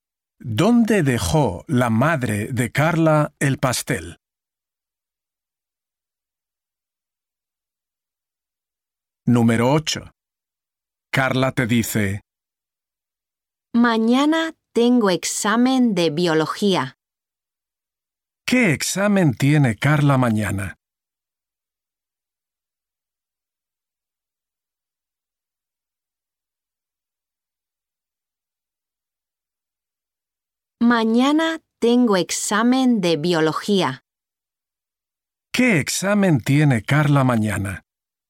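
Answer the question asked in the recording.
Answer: De biología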